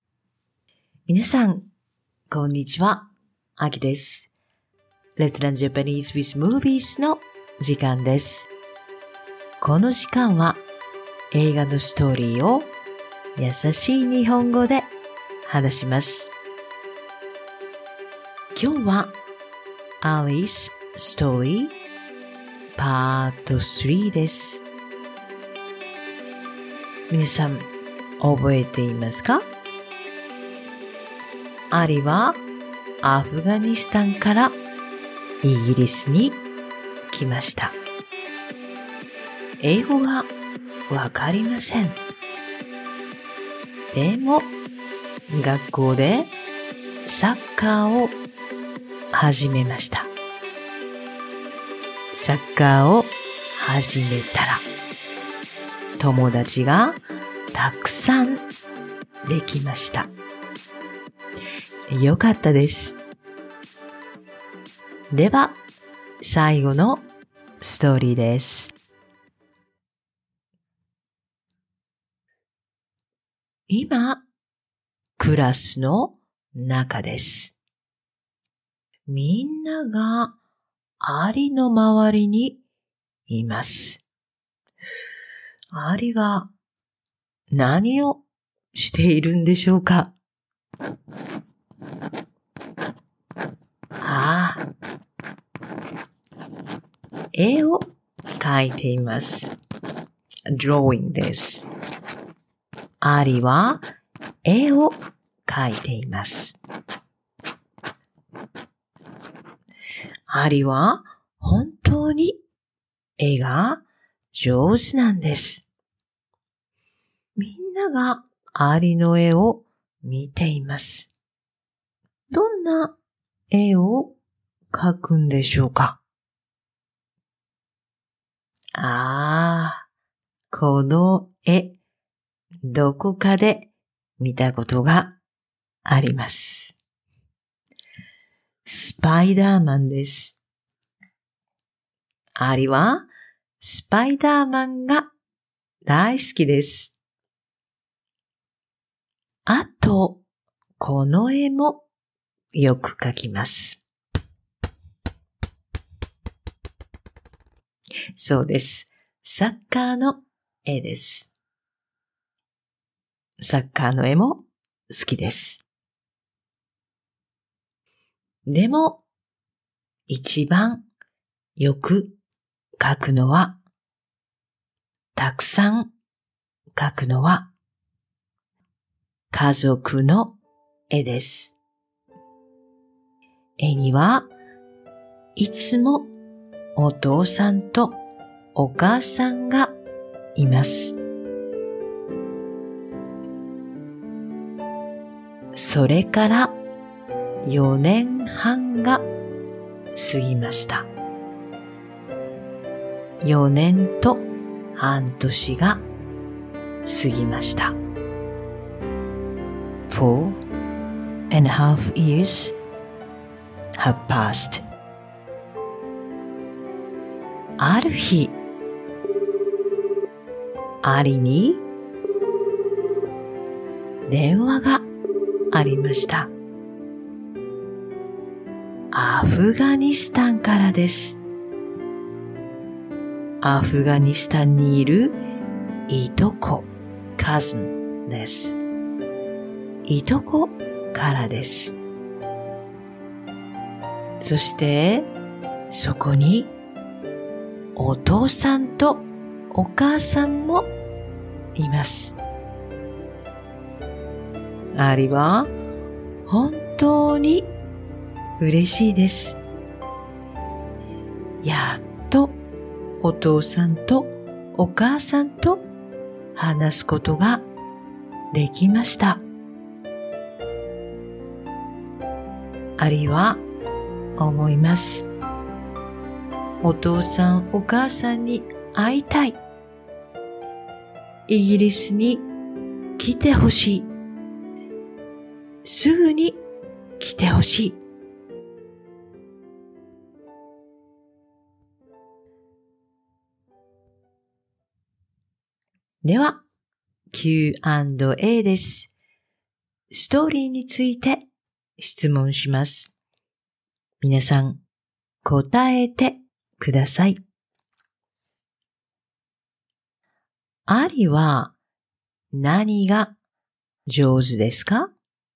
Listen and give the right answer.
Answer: 絵です。絵を描くのが上手です。